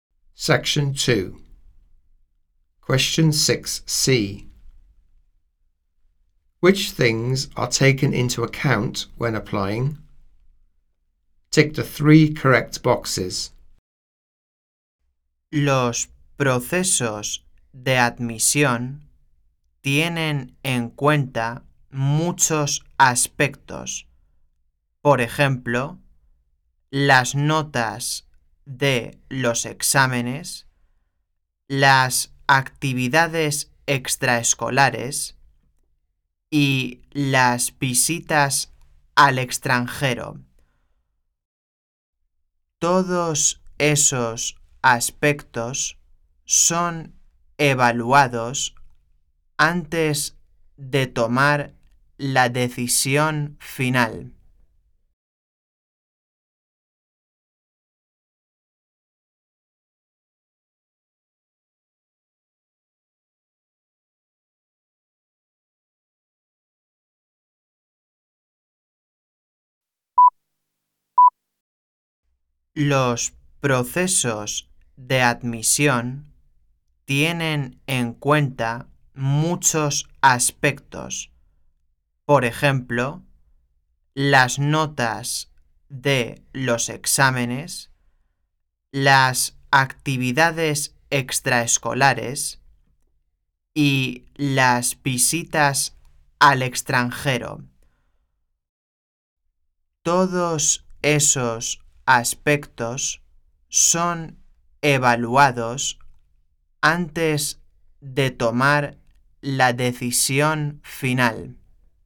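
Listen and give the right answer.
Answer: Exam grades, extracurricular activities and visits abroad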